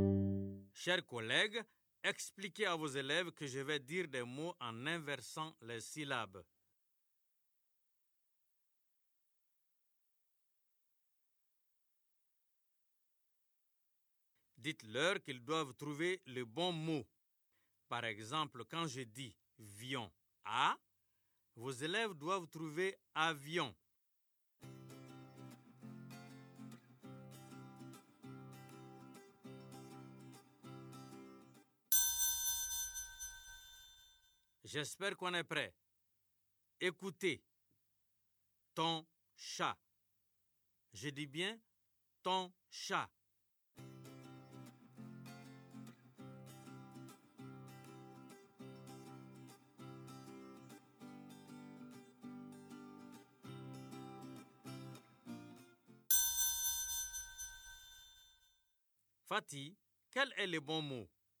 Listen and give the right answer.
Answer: Ton chat. C'est chaton, monsieur.